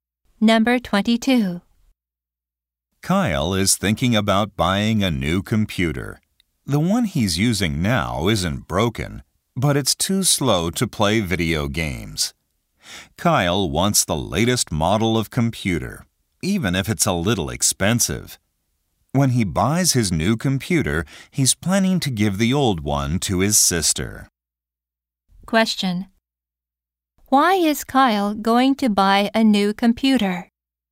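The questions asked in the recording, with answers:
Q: Why is Kyle going to buy a new computer?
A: His computer is too slow to play video games.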